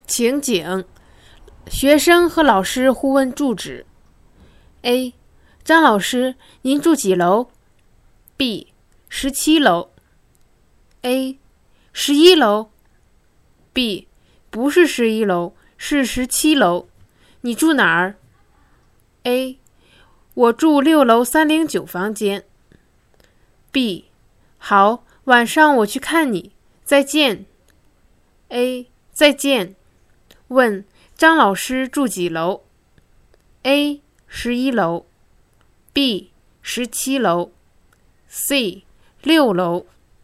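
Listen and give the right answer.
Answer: B: 17楼。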